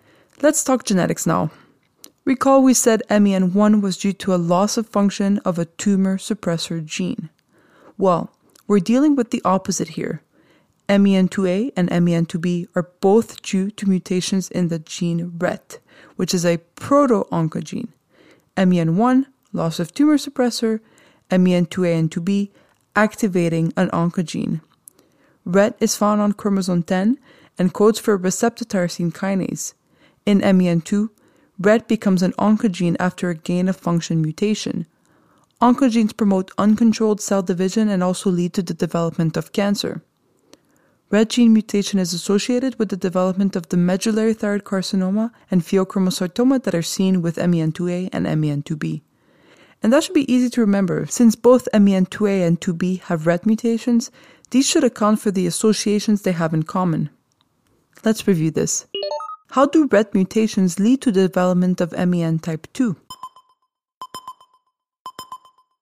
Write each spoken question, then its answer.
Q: How do RET mutations lead to the development of MEN type 2?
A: A gain-of-function mutation in the RET proto-oncogene makes it an oncogene, which causes the uncontrolled cell division seen in cancer.